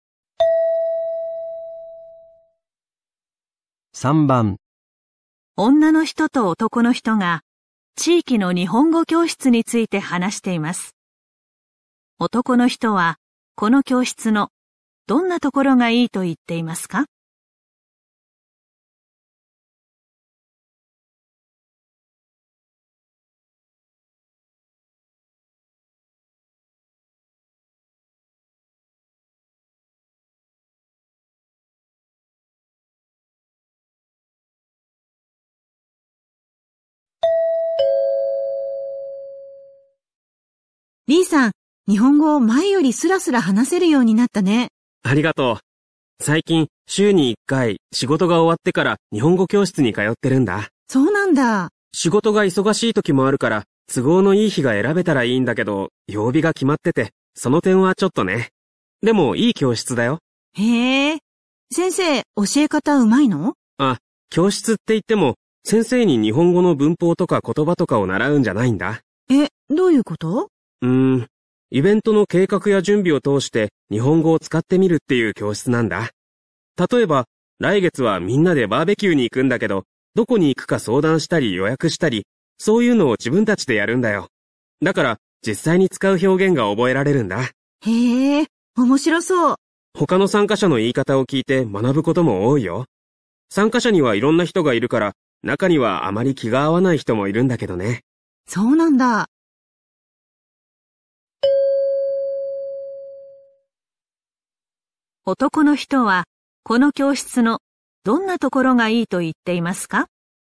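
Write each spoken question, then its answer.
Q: 男の人は、この教室のどんなところがいいと言っていますか?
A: イベントの準備を通して実際に使う表現が覚えられる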